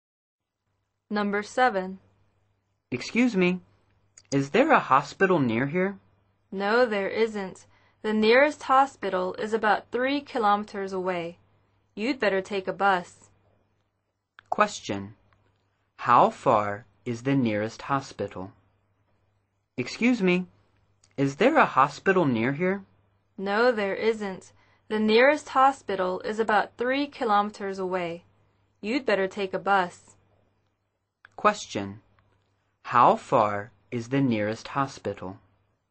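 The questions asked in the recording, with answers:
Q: Question, how far is the nearest hospital?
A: About 3 kilometers away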